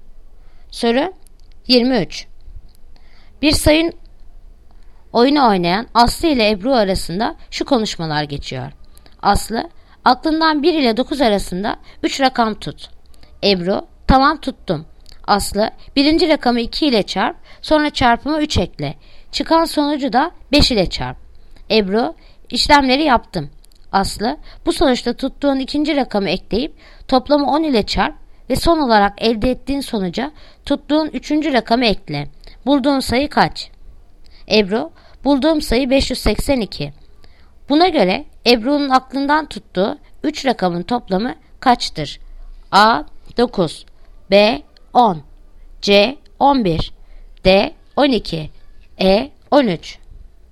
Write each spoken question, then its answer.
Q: Buna göre Ebru'nun aklından tuttuğu 3 rakamın toplamı kaçtır?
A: Yanıt Adana 9